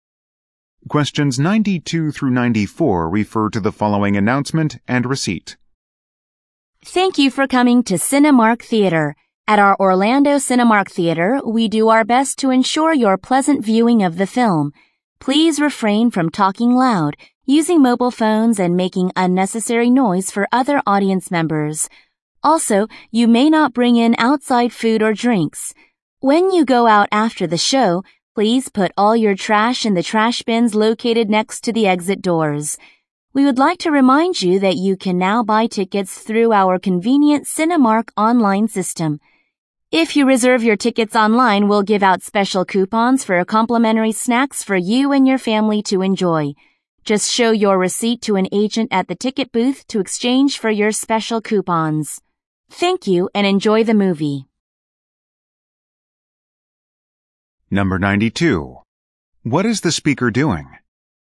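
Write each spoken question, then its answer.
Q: What is the speaker doing?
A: Giving movie theater guidelines before a film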